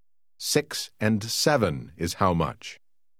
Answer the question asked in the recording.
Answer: 13.